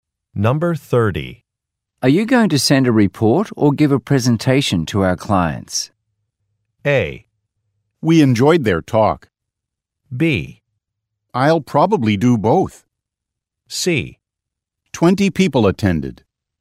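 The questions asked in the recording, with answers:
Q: Are you going to send a report or give a presentation to our clients?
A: B: I'll probably do both.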